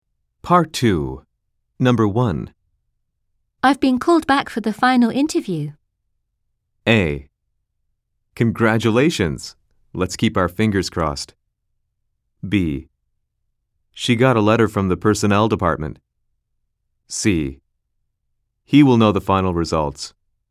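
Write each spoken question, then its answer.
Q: I've been called back for the final interview.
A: A: Congratulations. Let's keep our fingers crossed.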